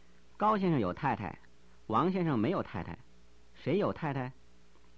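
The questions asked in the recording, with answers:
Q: 谁有太太?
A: 高先生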